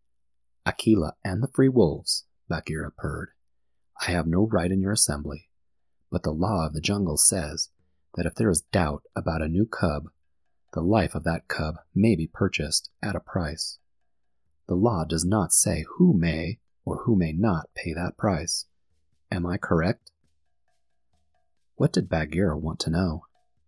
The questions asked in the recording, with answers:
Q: What did Bagheera want to know?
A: Bagheera asked the wolf pack if Mowgli could be purchased for a price.